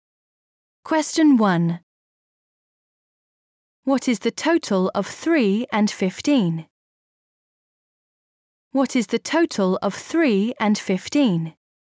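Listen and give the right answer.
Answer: 18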